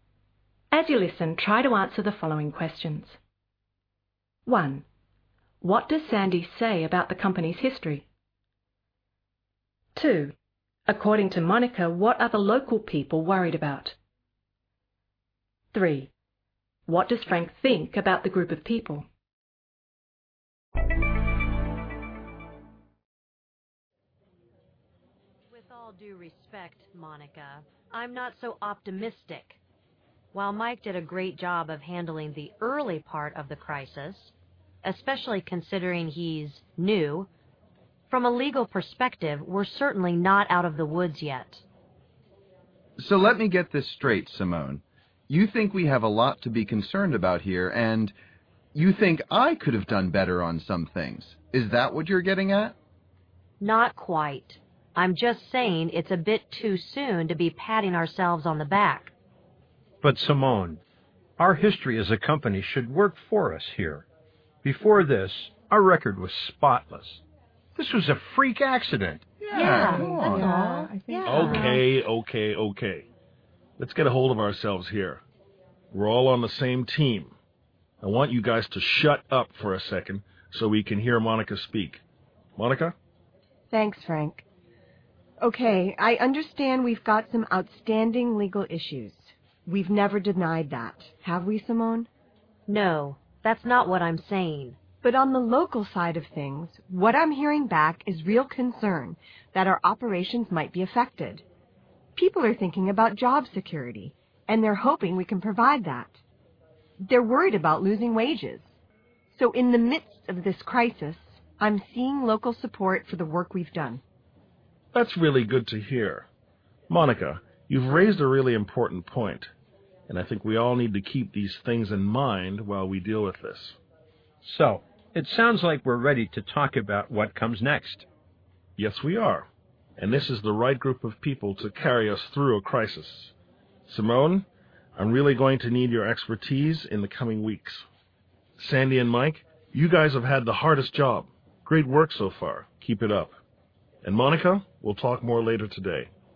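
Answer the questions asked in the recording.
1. It should work for them; their record was spotless before this freak accident.
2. Job security and losing wages.
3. It is the right group of people to carry them through the crisis.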